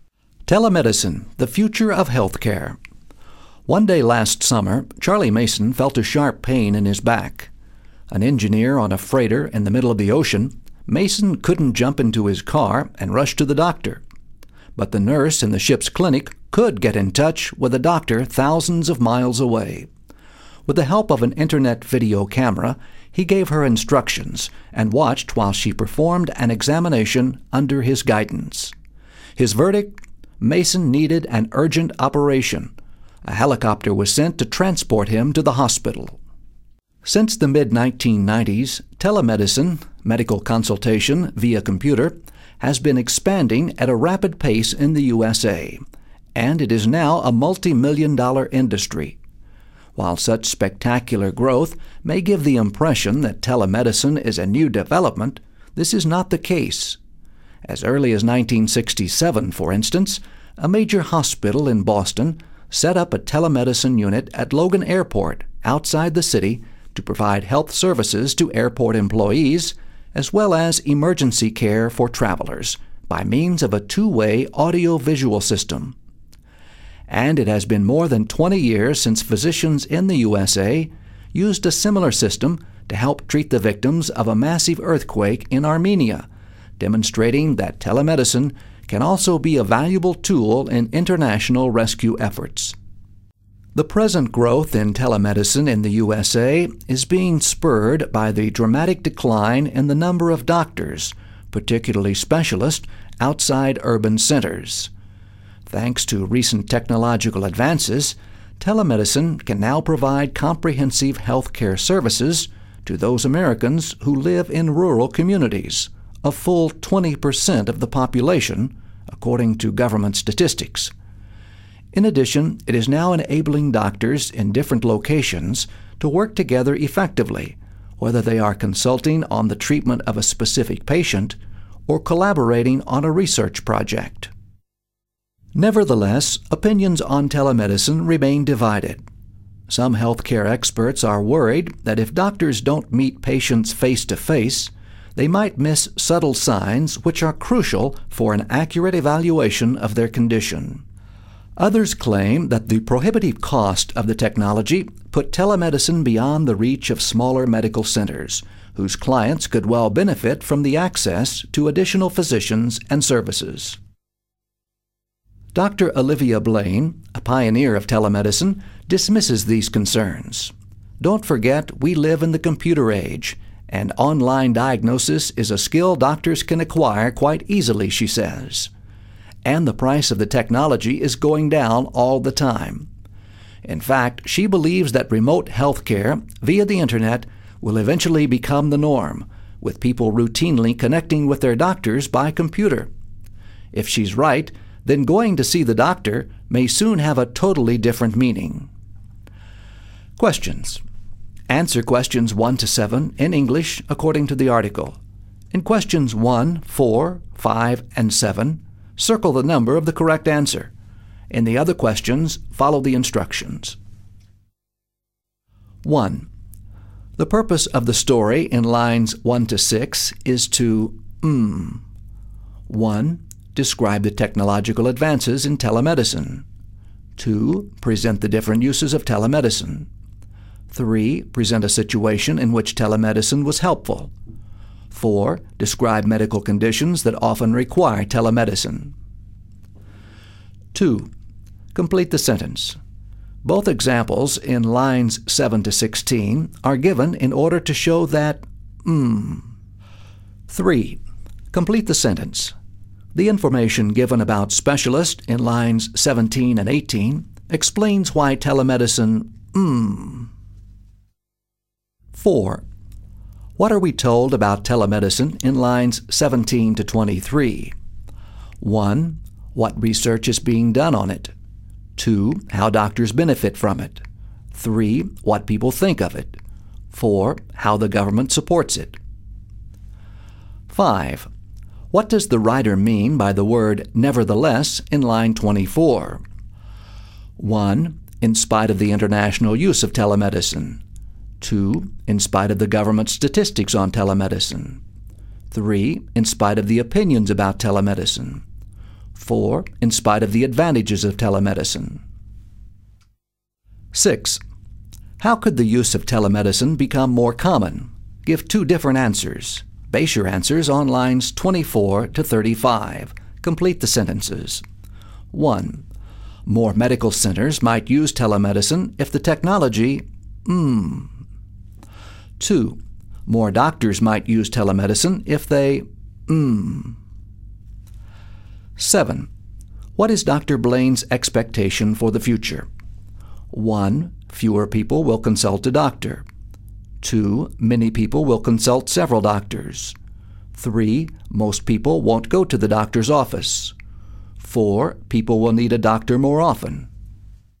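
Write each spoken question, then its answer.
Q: The purpose of the story in lines 1 to 6 is to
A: 3: Present a situation in which telemedicine was helpful.

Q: What are we told about telemedicine in lines 17 to 23?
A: 2: How doctors benefit from it

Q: What does the writer mean by the word nevertheless in line 24?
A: 4: In spite of the advantages of telemedicine.

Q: What is Dr. Blaine's expectation for the future?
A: 3: Most people won't go to the doctor's office.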